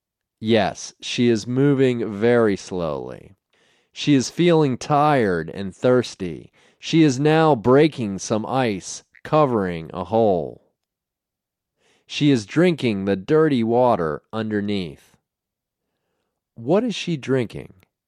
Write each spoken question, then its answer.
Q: What is she drinking?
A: She is drinking dirty water.